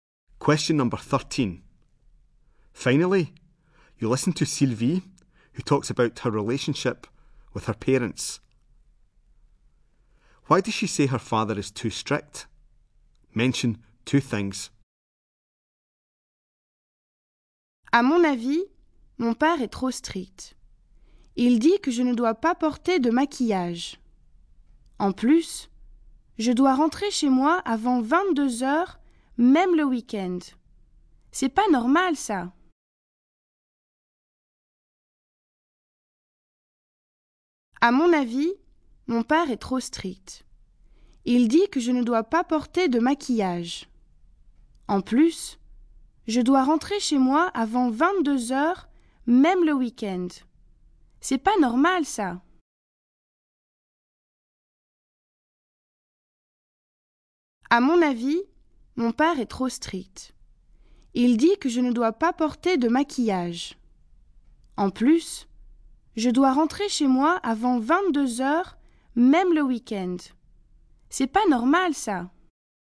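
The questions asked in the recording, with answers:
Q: Why does she say her father is too strict?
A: She can't wear make-up; she must be home before 10 pm, even at weekends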